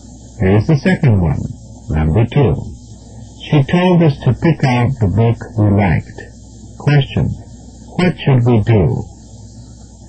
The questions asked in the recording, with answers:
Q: what should we do?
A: Select a book we like.